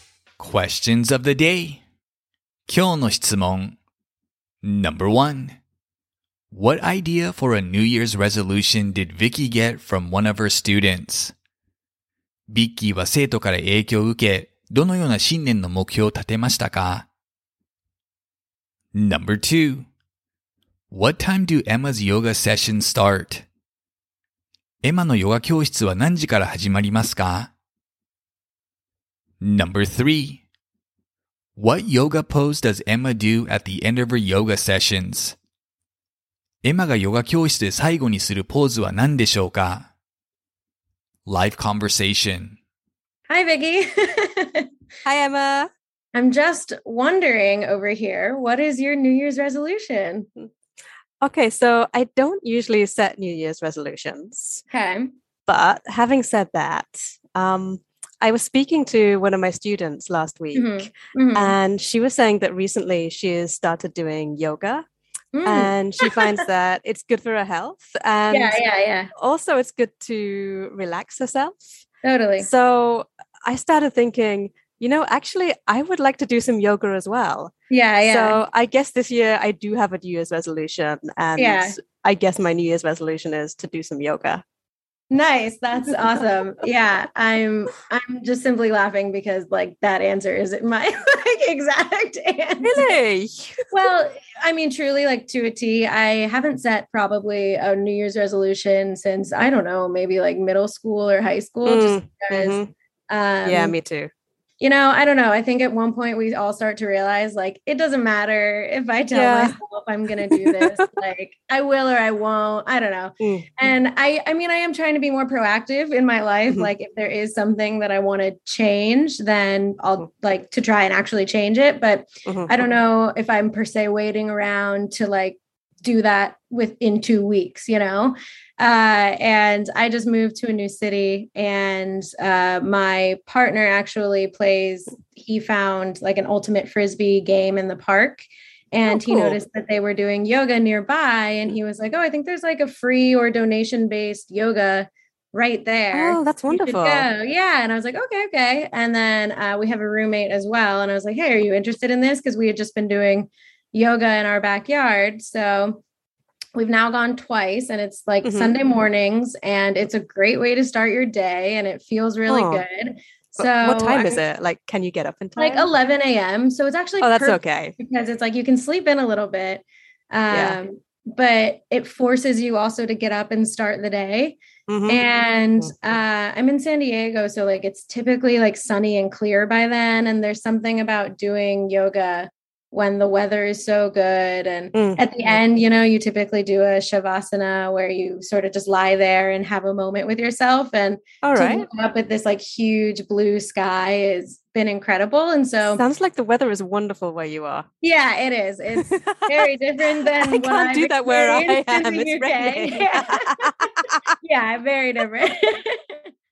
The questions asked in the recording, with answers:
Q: What idea for a New Year's resolution did Vicky get from one of her students?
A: She got the idea of doing yoga for her New Year's resolution from one of her students.

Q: What time do Emma's yoga session start?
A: They start at 11 a.m.

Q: What yoga pose does Emma do at the end of her yoga sessions?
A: She performs a Shavasana pose at the end of her sessions.